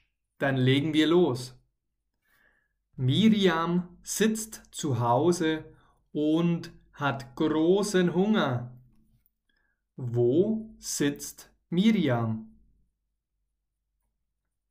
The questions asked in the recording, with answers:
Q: Wo sitzt Miriam?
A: Zu Hause. Sie, also Miriam, sitzt zu Hause.